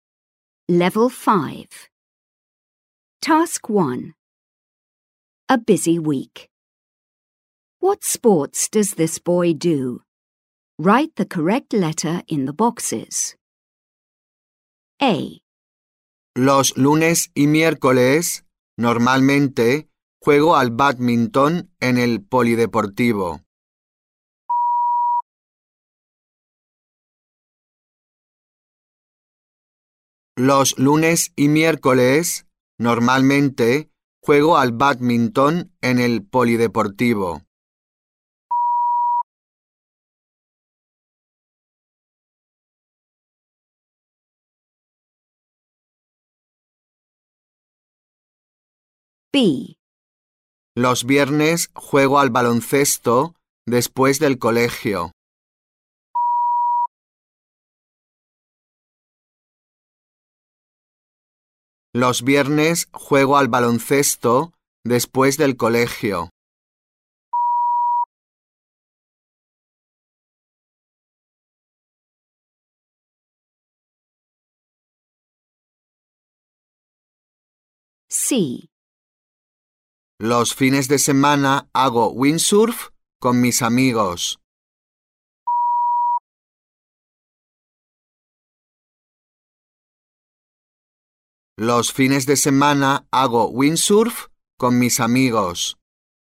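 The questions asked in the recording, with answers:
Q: What sports does this boy do?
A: Badminton (Mondays and Wednesdays), basketball (Fridays), windsurfing (weekends)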